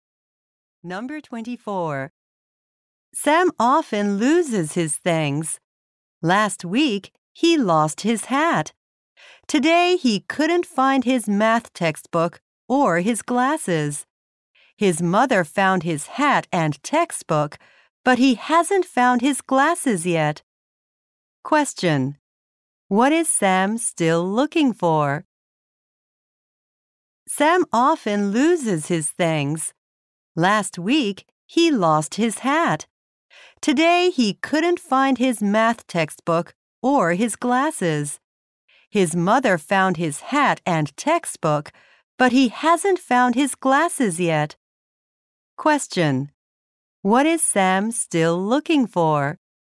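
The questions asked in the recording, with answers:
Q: What is Sam still looking for?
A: His glasses.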